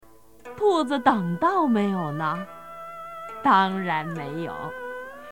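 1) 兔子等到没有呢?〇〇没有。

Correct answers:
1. 当然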